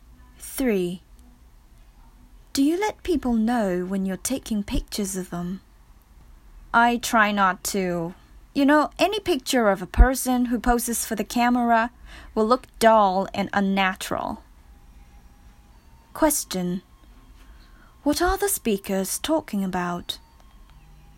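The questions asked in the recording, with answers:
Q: What are the speakers talking about?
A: Taking pictures of people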